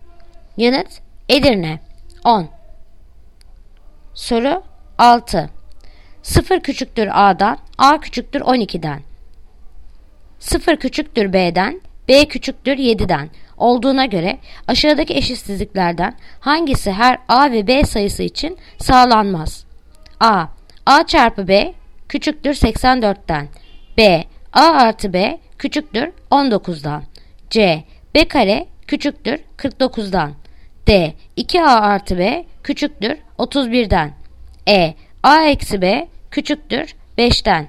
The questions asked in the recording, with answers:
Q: 0 küçüktür A'dan, A küçüktür 12'den 0 küçüktür B'den, B küçüktür 7'den olduğuna göre aşağıdaki eşitsizliklerden hangisi her A ve B sayısı için sağlanmaz?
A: Yanıt Edirne. A eksi B küçüktür 5'ten.